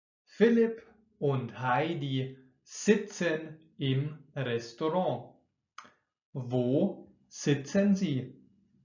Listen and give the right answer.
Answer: Im Restaurant. Sie sitzen im Restaurant.